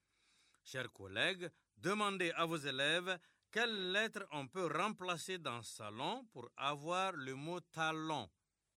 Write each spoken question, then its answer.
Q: Chers collègues, demandez à vos élèves quelles lettres on peut remplacer dans salon pour avoir le mot talon.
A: Dans salon, on remplace S par T pour avoir talon.